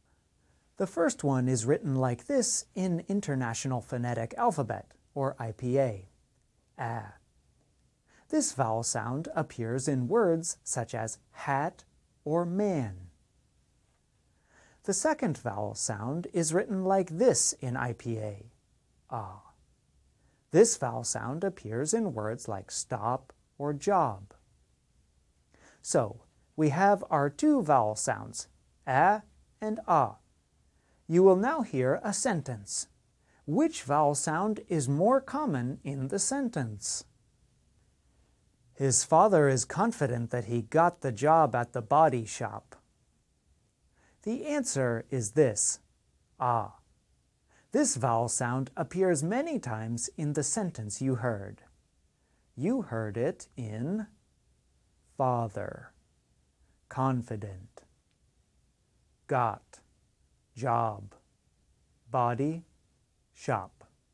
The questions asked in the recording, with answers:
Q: Which vowel sound is more common in the sentence?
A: The answer is this, This vowel sound appears many times in the sentence you heard.